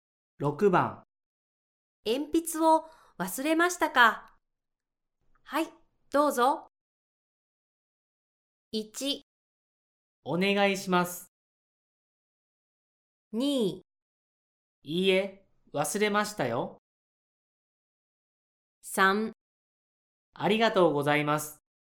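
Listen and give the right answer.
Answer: 3: ありがとうございます。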